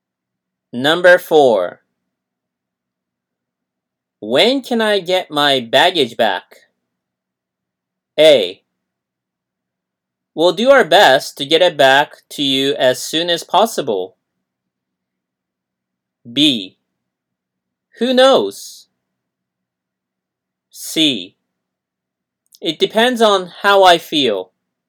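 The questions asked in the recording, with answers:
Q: When can I get my baggage back?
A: A: We'll do our best to get it back to you as soon as possible.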